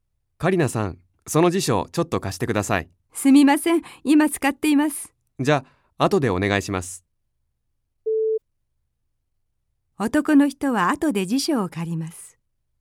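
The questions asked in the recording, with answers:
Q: 男の人は後で辞書を借ります。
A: ○(正しい)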